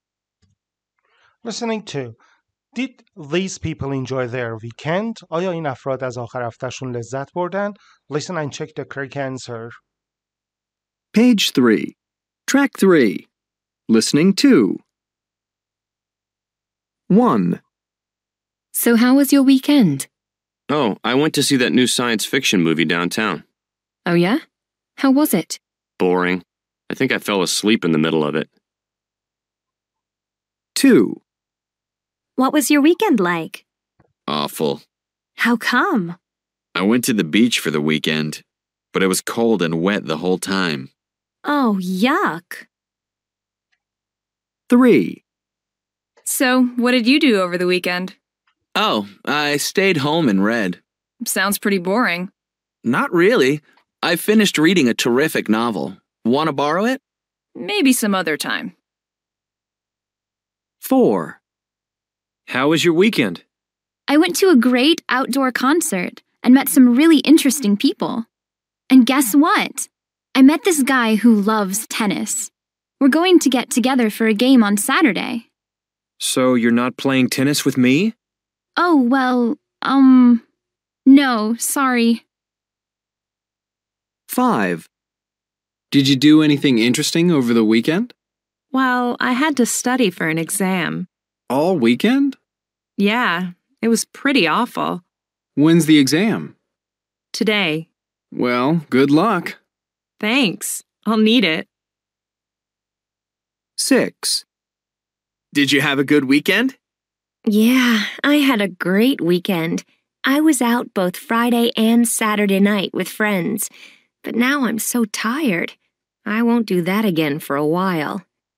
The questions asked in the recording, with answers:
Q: did these people enjoy their weekend?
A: One no

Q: did these people enjoy their weekend?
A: two no

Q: did these people enjoy their weekend?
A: three yes

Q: did these people enjoy their weekend?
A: four yes

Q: did these people enjoy their weekend?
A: five no

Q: did these people enjoy their weekend?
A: six yes